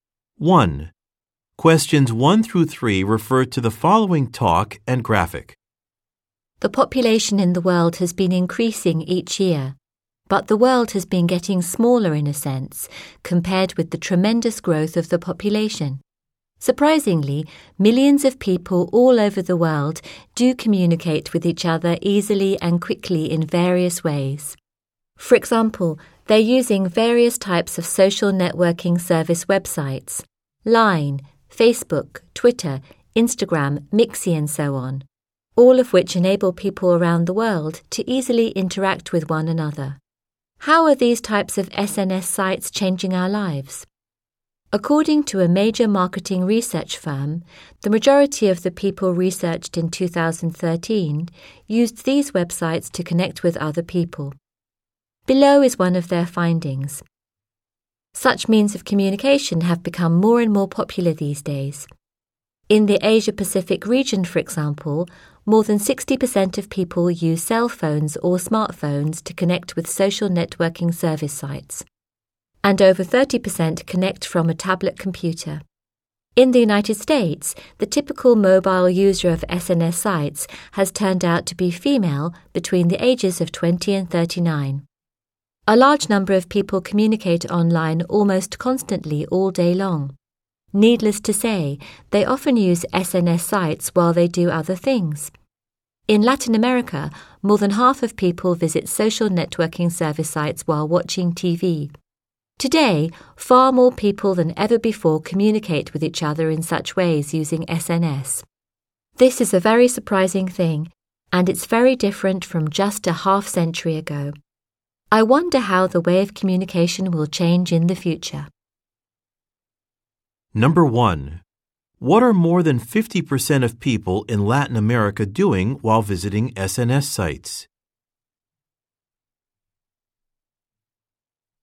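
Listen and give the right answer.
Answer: Watching TV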